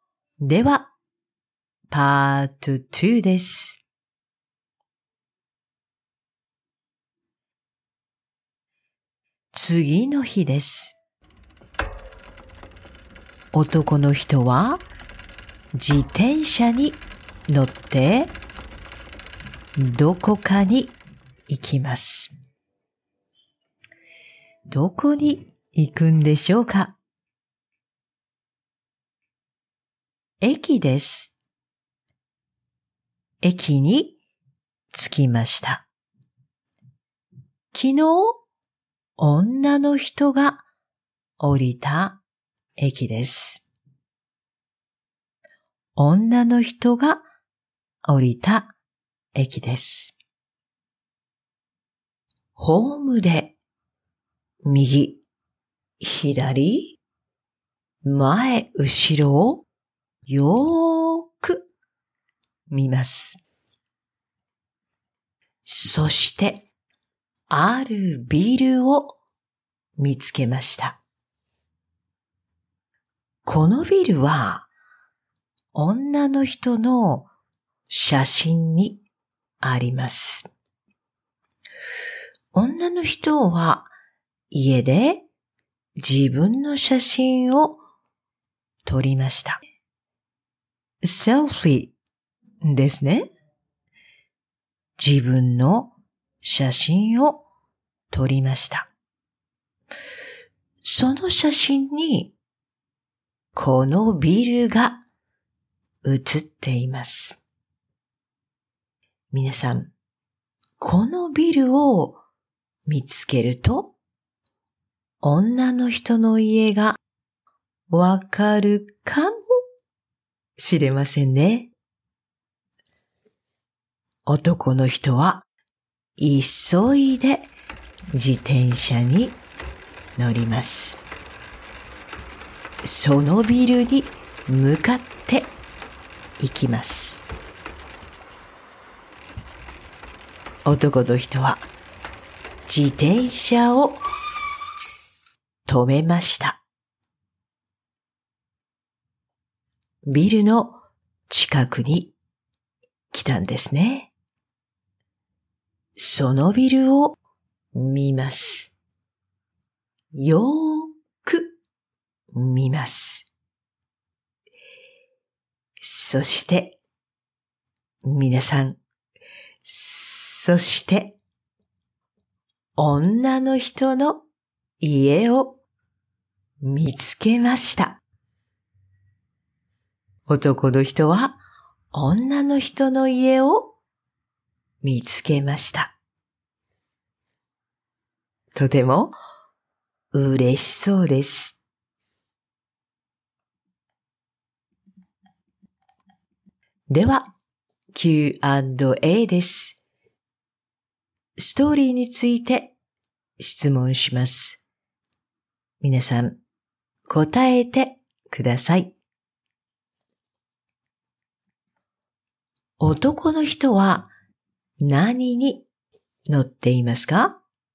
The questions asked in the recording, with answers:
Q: 男の人は何に乗っていますか?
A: 自転車に乗っています。